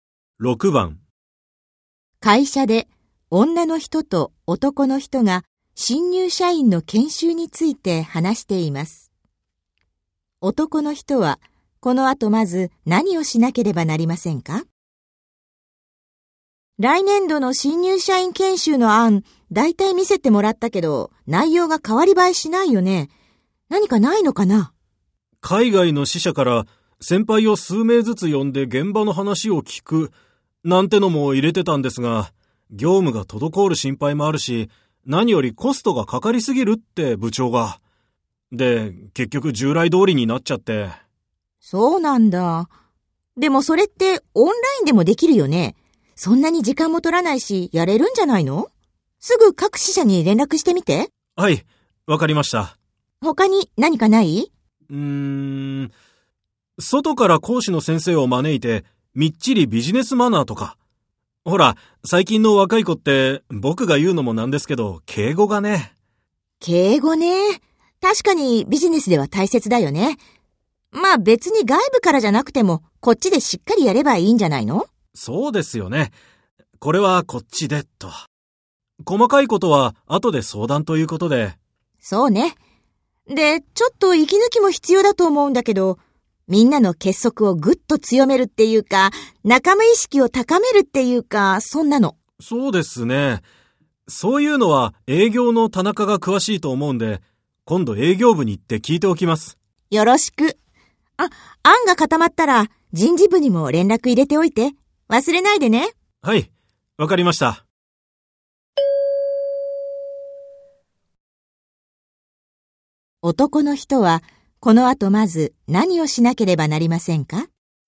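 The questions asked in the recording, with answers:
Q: 男の人はこの後まず何をしなければなりませんか?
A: 海外の各支社に連絡する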